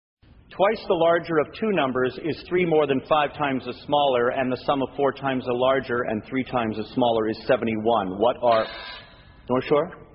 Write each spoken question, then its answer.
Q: What are... North Shore?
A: 14 and 5.